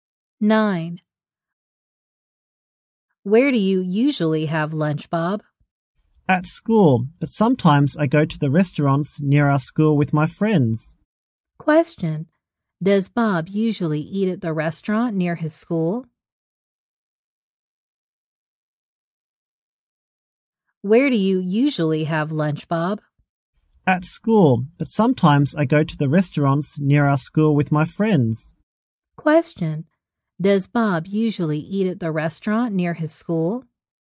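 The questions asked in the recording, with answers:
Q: Does Bob usually eat at the restaurant near his school?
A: No, he usually eats at school.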